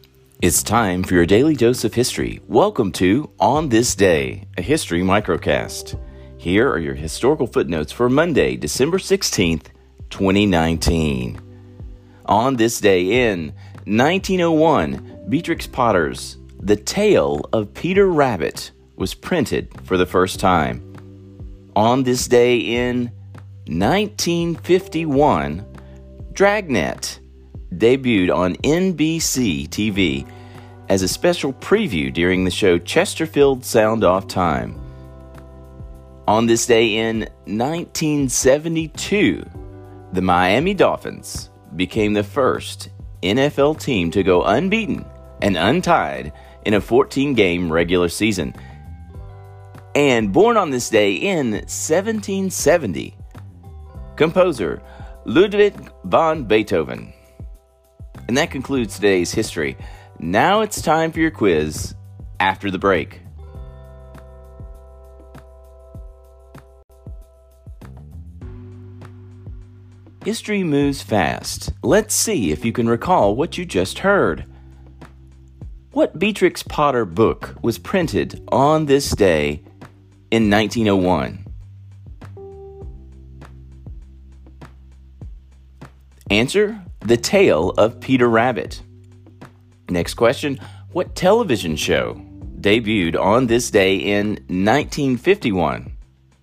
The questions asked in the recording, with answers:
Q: what television show debuted on this day in 1951?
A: Dragnet.